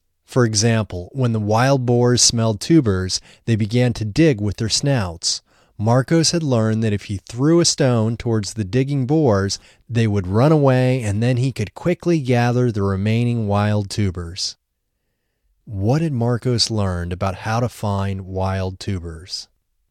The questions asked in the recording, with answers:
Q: What had Marcos learned about how to find wild tubers?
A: Marcos had learned that if he threw a stone towards the digging boars, they would run away and then he could quickly gather the remaining wild tubers.